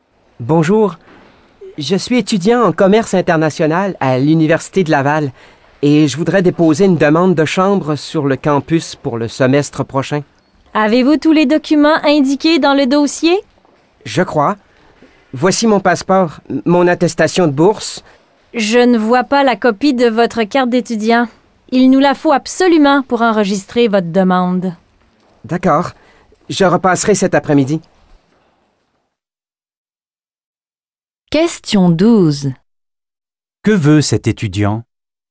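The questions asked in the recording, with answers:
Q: Que veut cet étudiant?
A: Déposer une demande de chambre sur le campus pour le semestre prochain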